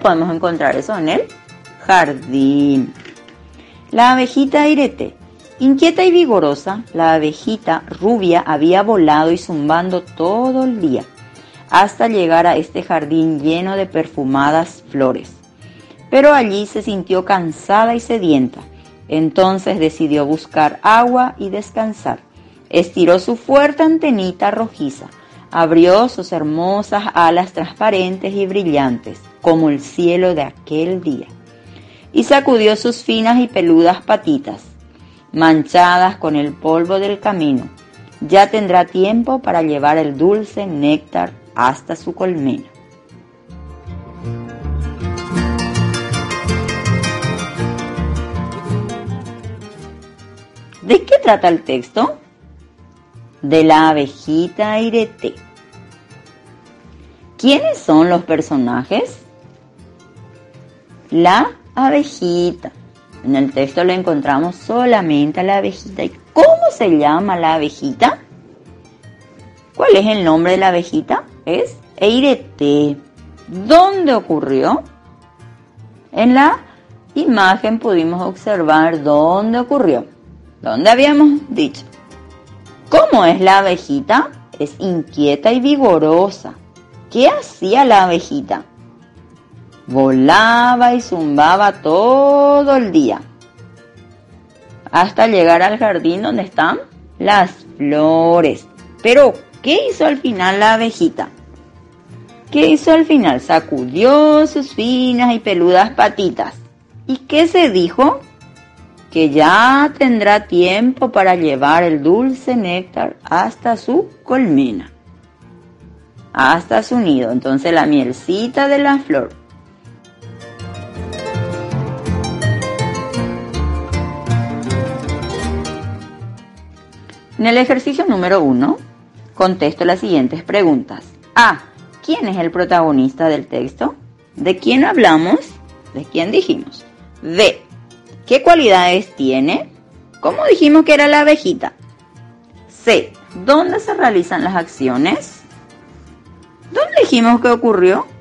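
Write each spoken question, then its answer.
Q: ¿Quién es el protagonista del texto?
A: La abejita Irete

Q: ¿Qué cualidades tiene?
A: Es inquieta y vigorosa

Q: ¿Dónde se realizan las acciones?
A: En el jardín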